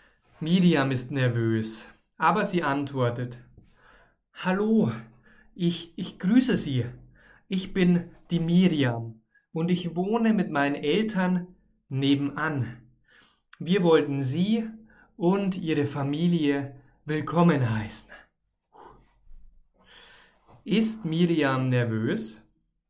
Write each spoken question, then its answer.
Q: Ist Miriam nervös?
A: Ja, sie ist nervös.